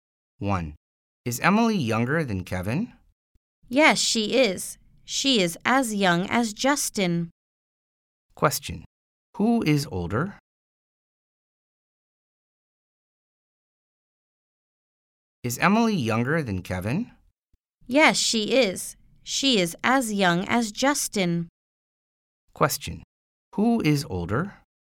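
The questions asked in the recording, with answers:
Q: Who is older?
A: Kevin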